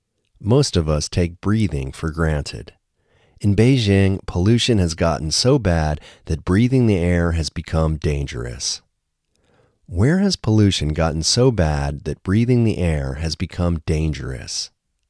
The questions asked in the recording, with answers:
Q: Where has pollution gotten so bad that breathing the air has become dangerous?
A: In Beijing, pollution has gotten so bad that breathing the air has become dangerous.